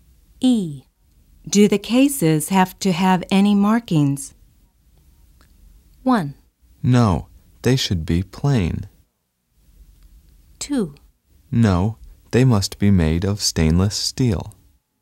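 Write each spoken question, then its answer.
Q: Do the cases have to have any markings?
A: 1: No, they should be plain.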